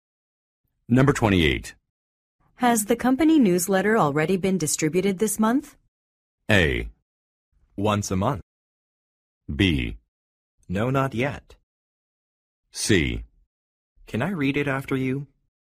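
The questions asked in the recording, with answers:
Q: Has the company newsletter already been distributed this month?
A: B: No, not yet.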